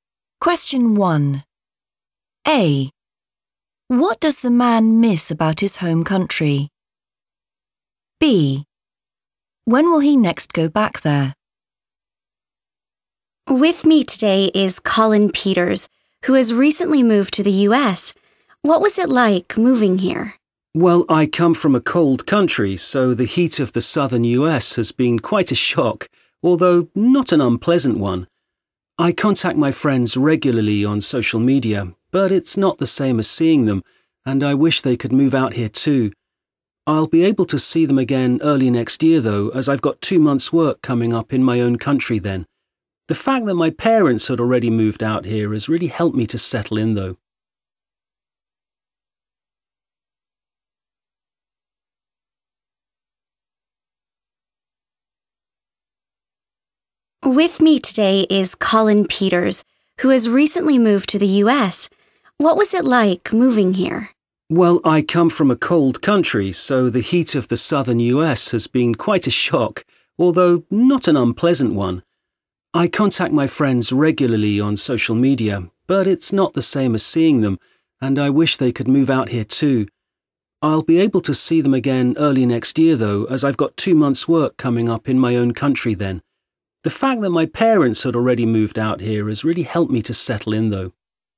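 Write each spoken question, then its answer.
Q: What does the man miss about his home country?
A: his friends

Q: When will he next go back there?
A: early next year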